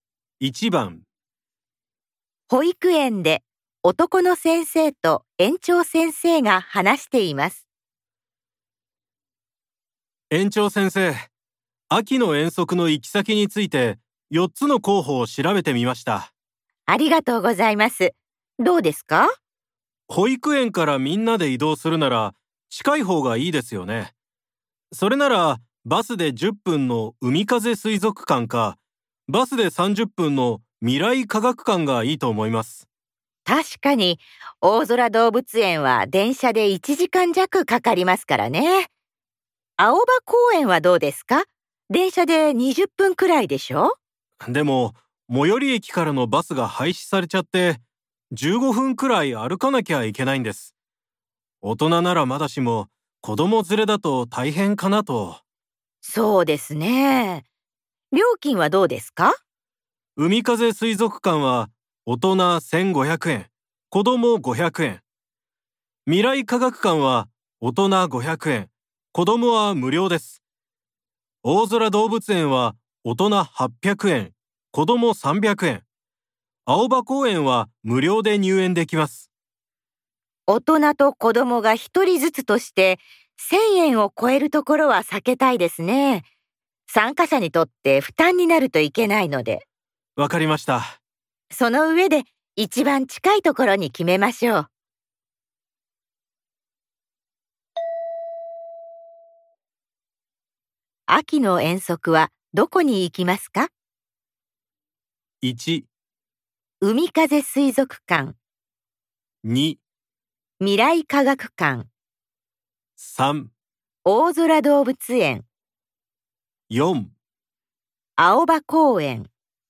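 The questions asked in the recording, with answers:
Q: 秋の遠足はどこに行きますか ?1 海風水族館2未来科学館3大空動物園4青葉公園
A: 2: 未来科学館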